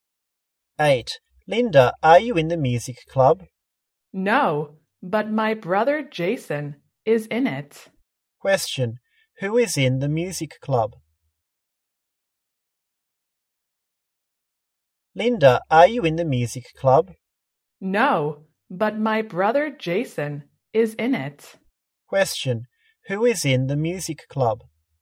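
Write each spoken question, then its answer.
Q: who is in the music club?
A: Linda's brother Jason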